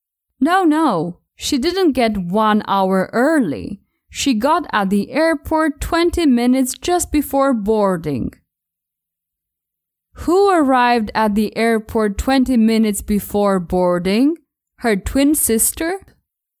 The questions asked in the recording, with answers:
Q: Who arrived at the airport 20 minutes before boarding?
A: Not her twin sister. Anne was the one who arrived 20 minutes just before boarding.